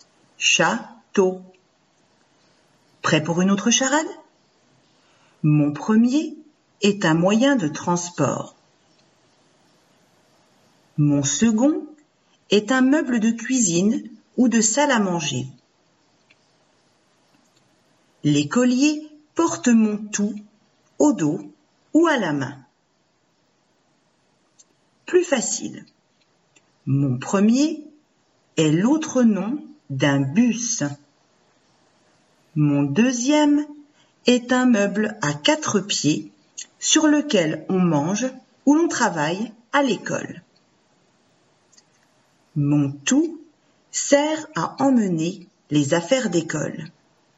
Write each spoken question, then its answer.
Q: Mon tout sert à emmener les affaires d'école.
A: C'est cartable.